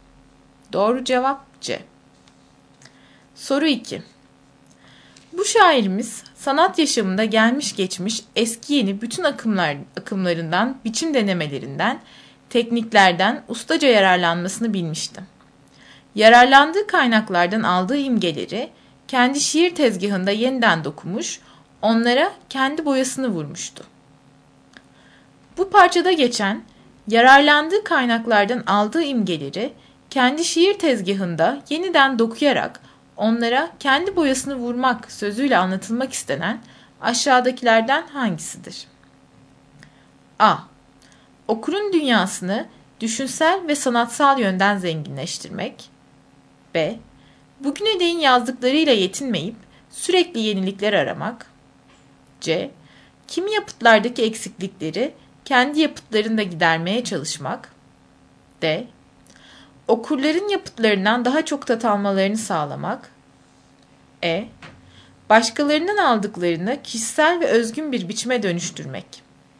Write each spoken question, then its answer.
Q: Bu parçada geçen yararlandığı kaynaklardan aldığı imgeleri kendi şiir tezgahında yeniden dokuyarak onlara kendi boyasını vurmak sözüyle anlatılmak istenen aşağıdakilerden hangisidir?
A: Doğru cevap E.